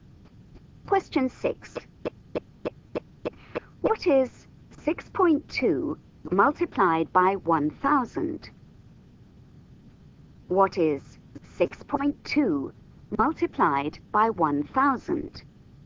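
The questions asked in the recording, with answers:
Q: What is 6.2 multiplied by 1,000?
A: 6,200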